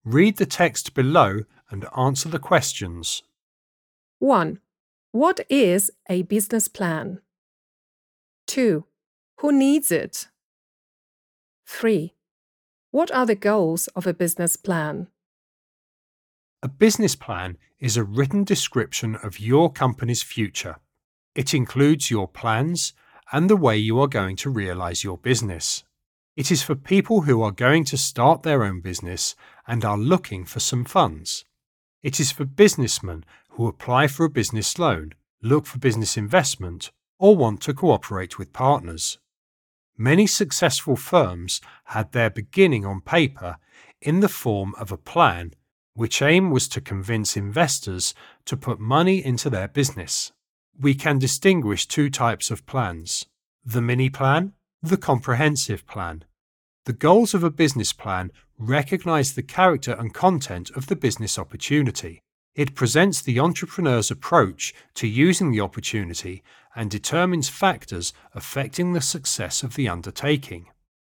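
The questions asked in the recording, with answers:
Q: What is a business plan?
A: A written description of your company's future

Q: Who needs it?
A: People starting their own business looking for funds, and businessmen applying for loans, investment or partners

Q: What are the goals of a business plan?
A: To recognize the character and content of the business opportunity, present the entrepreneur's approach, and determine success factors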